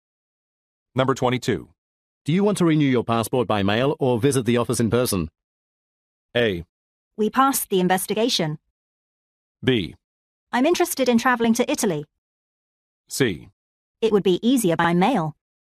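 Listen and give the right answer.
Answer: C: It would be easier by mail.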